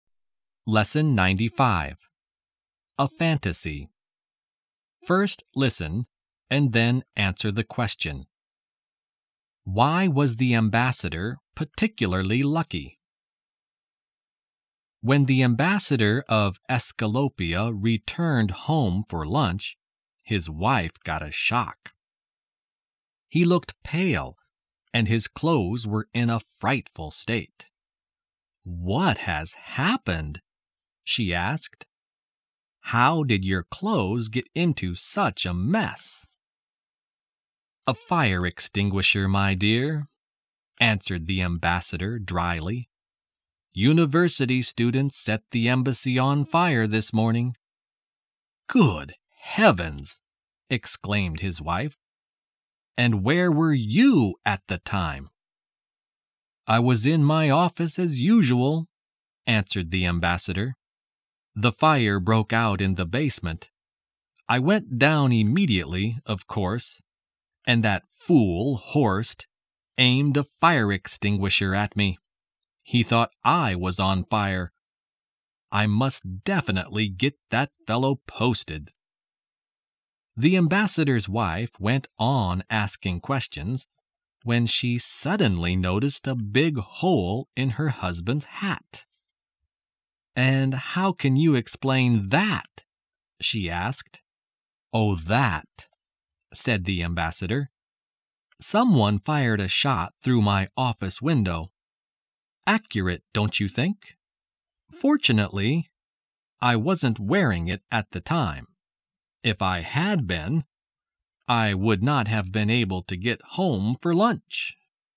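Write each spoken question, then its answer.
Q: Why was the ambassador particularly lucky?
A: He wasn't wearing his hat when someone fired a shot through it, so he wasn't hurt.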